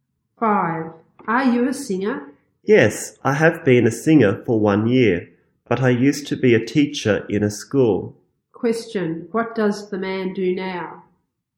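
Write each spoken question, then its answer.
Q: Question, what does the man do now?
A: He is a singer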